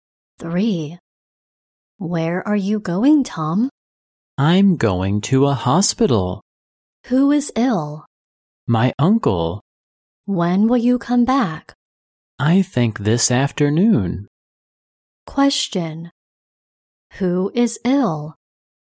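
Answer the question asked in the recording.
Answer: Tom's uncle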